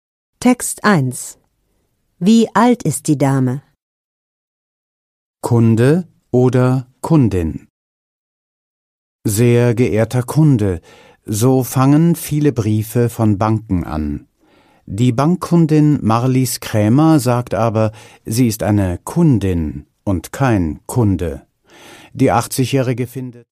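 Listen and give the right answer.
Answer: 80 Jahre alt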